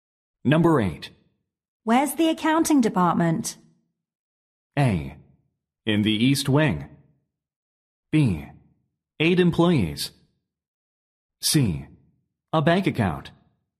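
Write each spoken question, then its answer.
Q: Where's the accounting department?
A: A: In the East Wing.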